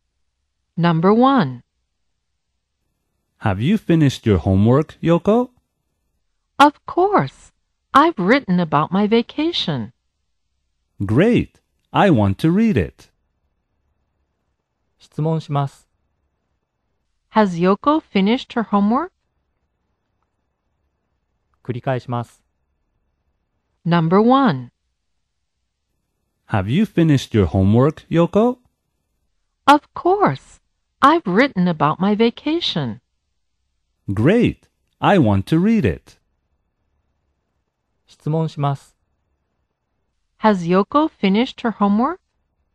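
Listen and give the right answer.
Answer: Yes, she has.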